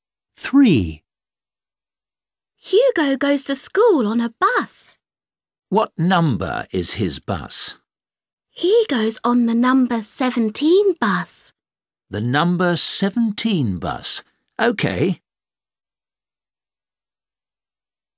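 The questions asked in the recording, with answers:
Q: What number is his bus?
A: 17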